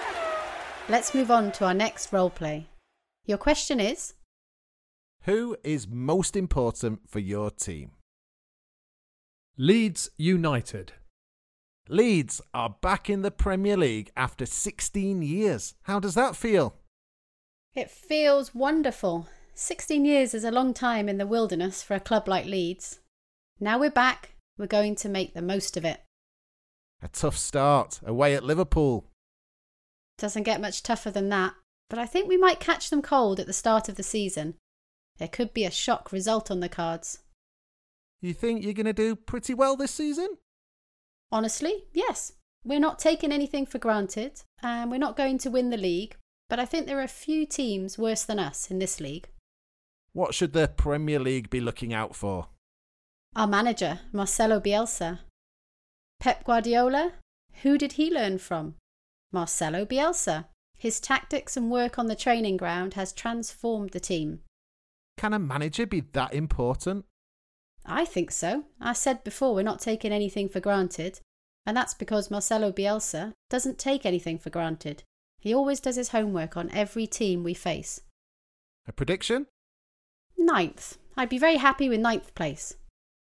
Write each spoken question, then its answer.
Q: Who is most important for your team?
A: The answer is the Leeds United manager, Marcelo Bielsa.